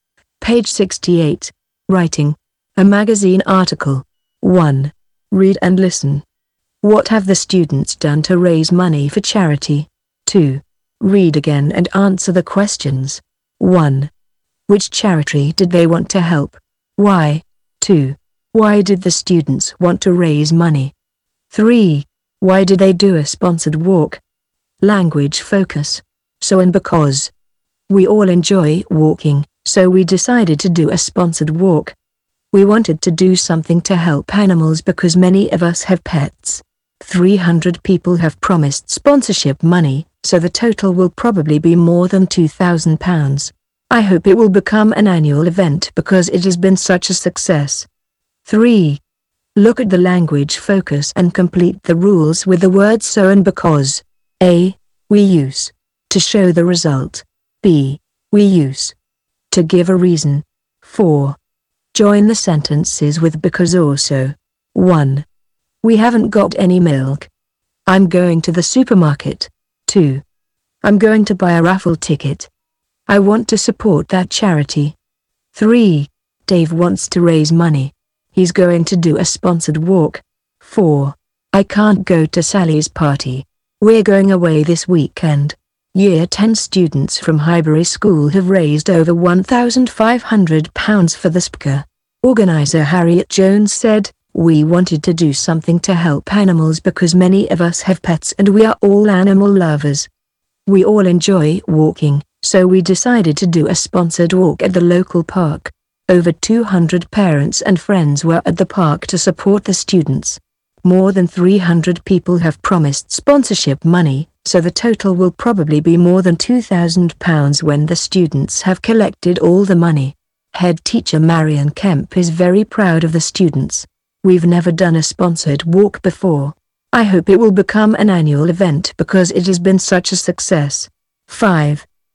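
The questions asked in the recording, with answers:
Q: What have the students done to raise money for charity?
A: A sponsored walk

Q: Which charity did they want to help?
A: The SPCA

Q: Why did the students want to raise money?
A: To help animals, because many of them have pets and they are all animal lovers

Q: Why did they do a sponsored walk?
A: Because they all enjoy walking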